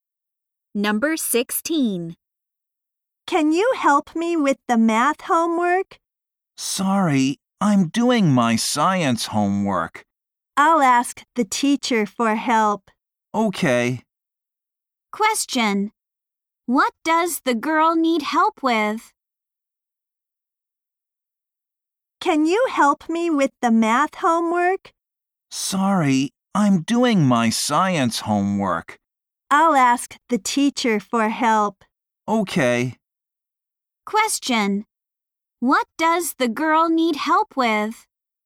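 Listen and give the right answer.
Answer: Her math homework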